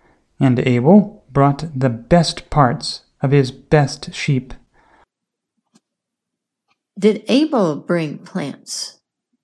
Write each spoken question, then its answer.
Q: Did Abel bring plants?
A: No, Abel brought the best parts of his best sheep.